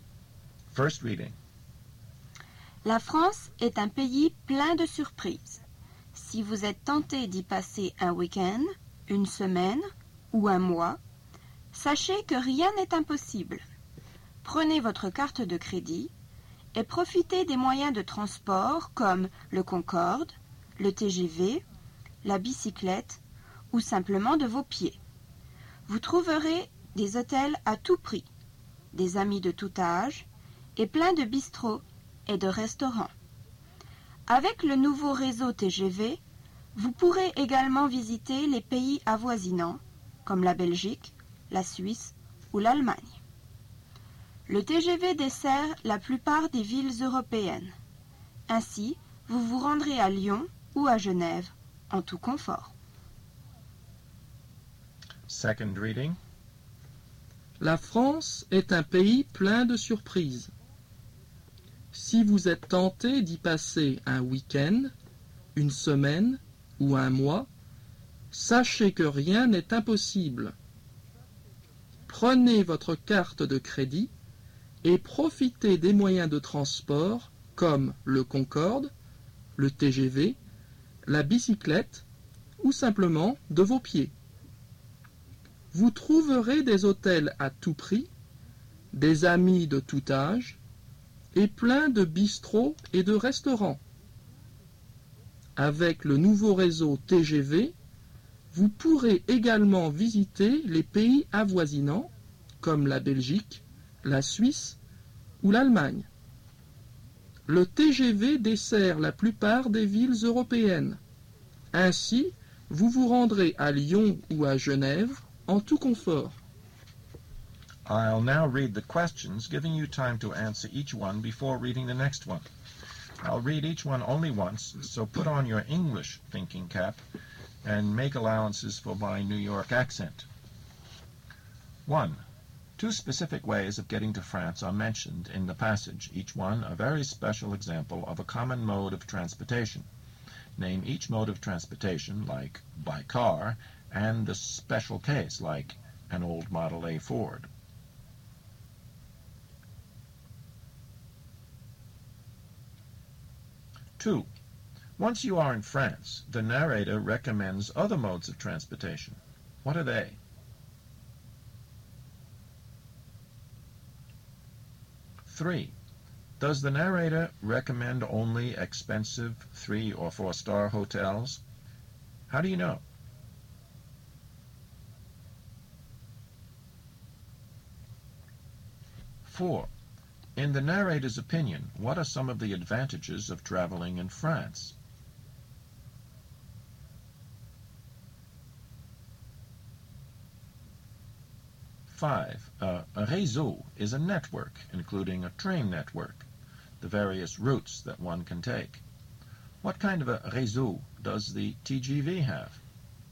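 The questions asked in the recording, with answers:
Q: Two specific ways of getting to France are mentioned in the passage, each one a very special example of a common mode of transportation. Name each mode of transportation, like by car, and the special case, like an old Model A Ford.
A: By plane (the Concorde) and by train (the TGV)

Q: Once you are in France, the narrator recommends other modes of transportation. What are they?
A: The bicycle and walking (on foot)

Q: Does the narrator recommend only expensive 3- or 4-star hotels? How do you know?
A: No; he says you will find hotels at every price

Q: In the narrator's opinion, what are some of the advantages of traveling in France?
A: France is full of surprises and anything is possible; there are hotels at every price, friends of all ages, lots of bistros and restaurants, and the TGV lets you visit nearby countries

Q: A réseau is a network, including a train network, the various routes that one can take. 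What kind of a réseau does the TGV have?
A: A new network that serves most European cities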